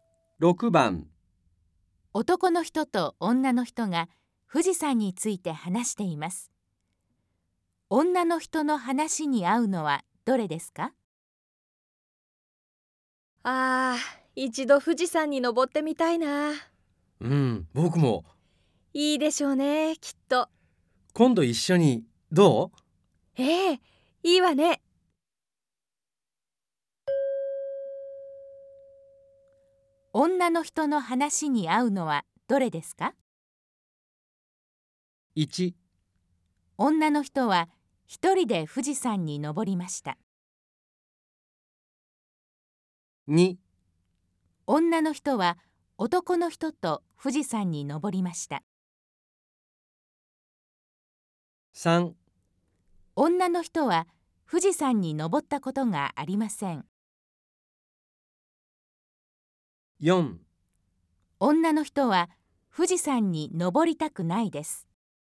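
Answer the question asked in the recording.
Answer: 3: 女の人は富士山に登ったことがありません。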